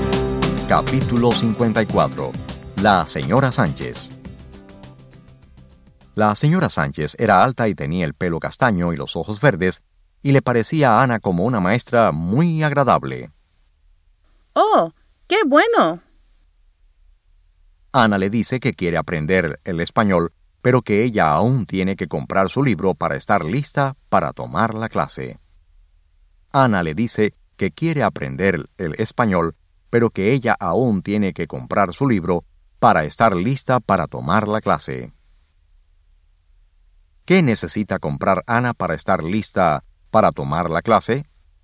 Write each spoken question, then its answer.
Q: ¿Qué necesita comprar Ana para estar lista para tomar la clase?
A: Ella tiene que comprar su libro para estar lista para tomar la clase.